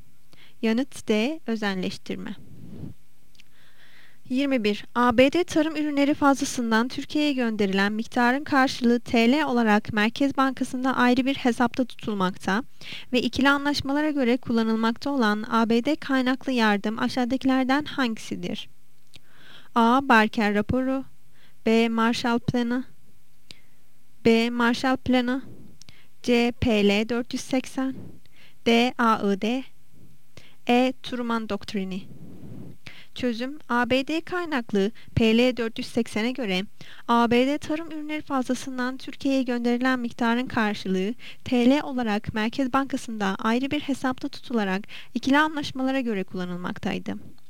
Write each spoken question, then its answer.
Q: ABD tarım ürünleri fazlasından Türkiye'ye gönderilen miktarın karşılığı TL olarak Merkez Bankası'nda ayrı bir hesapta tutulmakta ve ikili anlaşmalara göre kullanılmakta olan ABD kaynaklı yardım aşağıdakilerden hangisidir?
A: Yanıt C. PL 480.